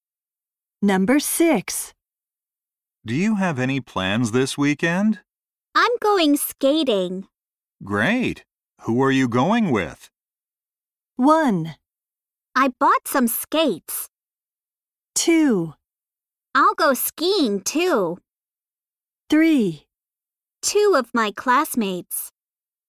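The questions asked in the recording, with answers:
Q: Great. Who are you going with?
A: 3: Two of my classmates.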